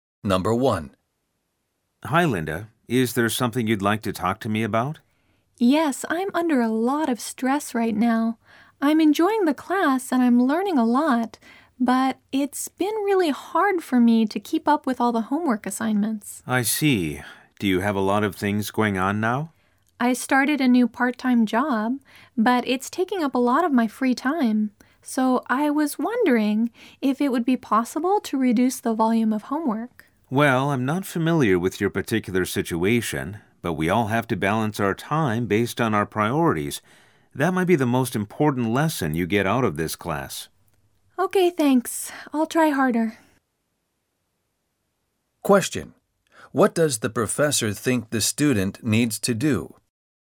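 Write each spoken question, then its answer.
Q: What does the professor think the student needs to do?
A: Balance her time based on her priorities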